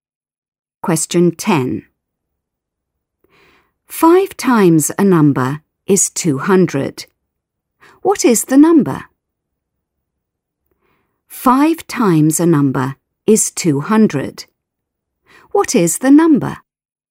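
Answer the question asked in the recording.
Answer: 40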